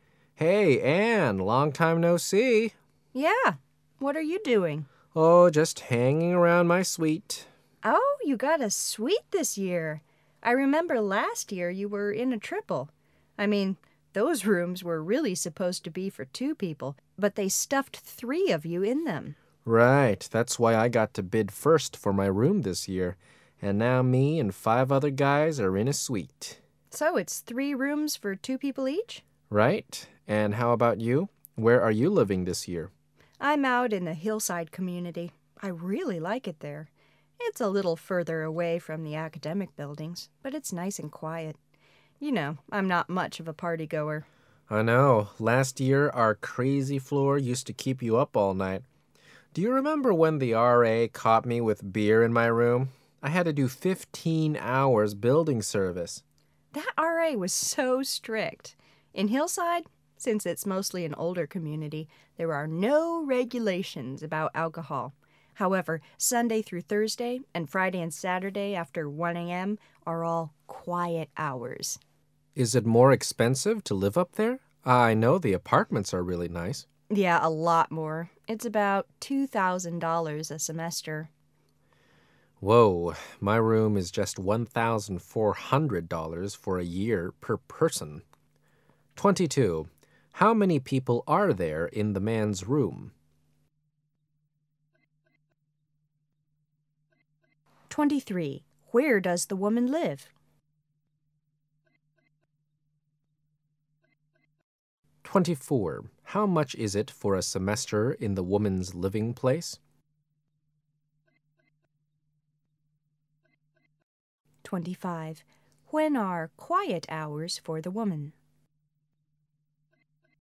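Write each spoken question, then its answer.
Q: Where does the woman live?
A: In the hillside community

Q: How much is it for a semester in the woman's living place?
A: About $2,000

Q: When are quiet hours for the woman?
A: Sunday through Thursday, and after 1 a.m. on Friday and Saturday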